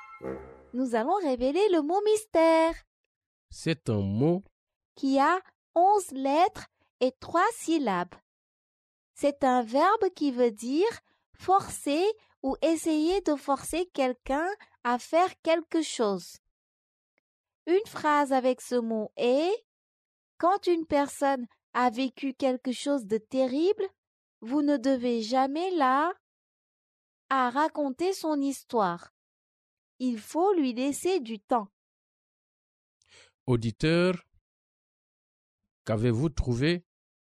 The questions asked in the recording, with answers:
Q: Auditeur, qu'avez-vous trouvé?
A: Le mot mystère est contraindre.